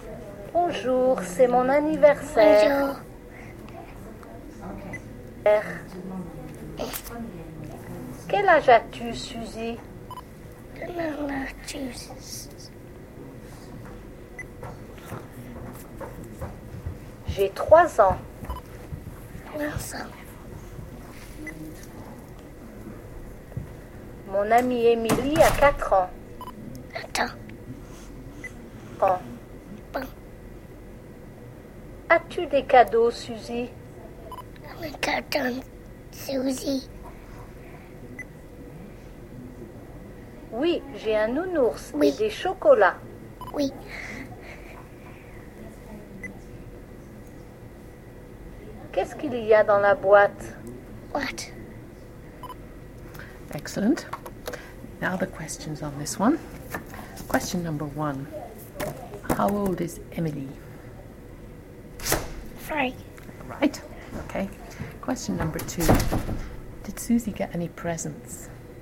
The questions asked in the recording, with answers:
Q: Did Suzy get any presents?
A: Yes.